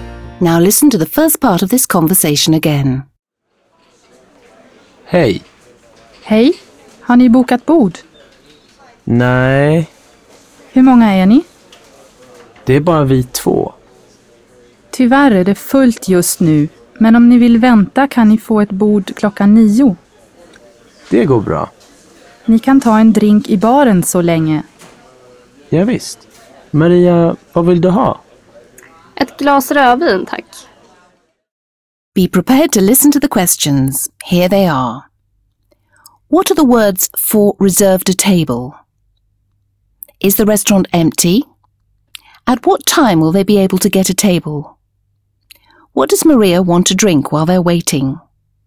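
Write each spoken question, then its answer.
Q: What are the words for reserved a table?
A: bokat bord

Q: Is the restaurant empty?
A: No, it is full right now

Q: At what time will they be able to get a table?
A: At 9 o'clock

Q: What does Maria want to drink while they're waiting?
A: A glass of red wine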